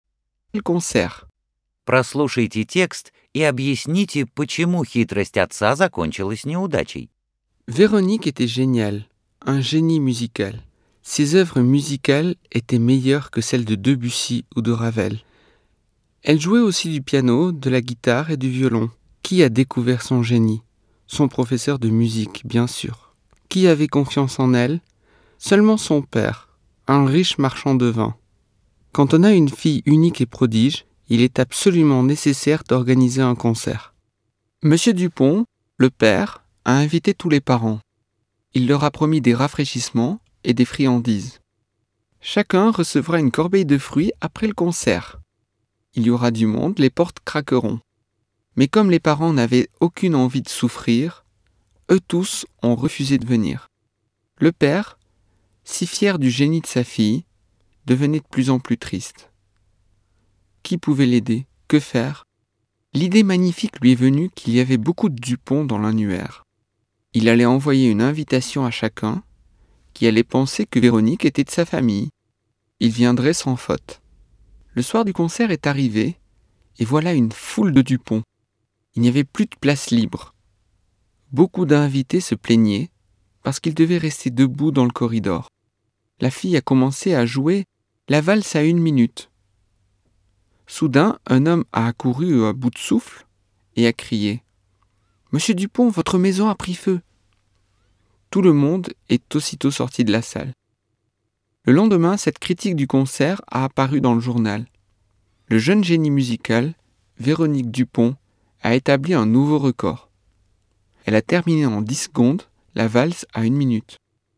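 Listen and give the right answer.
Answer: Все гости были Дюпонами; когда крикнули «Месье Дюпон, ваш дом горит!», каждый решил, что горит его дом, и все ушли из зала.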